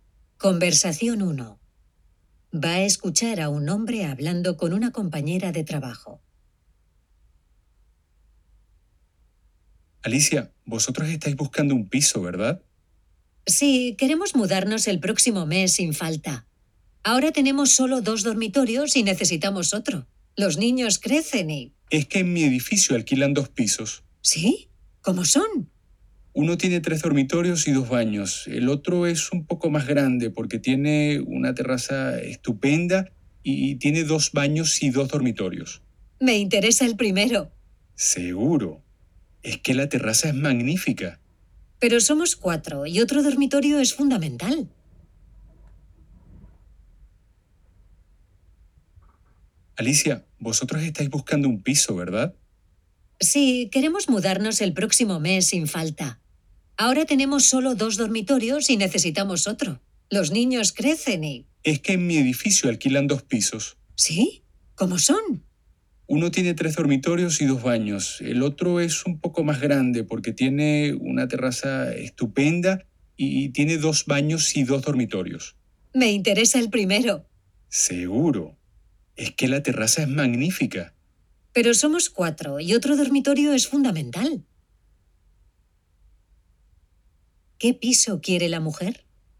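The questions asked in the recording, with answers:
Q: ¿Qué piso quiere la mujer?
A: El de 3 dormitorios y 2 baños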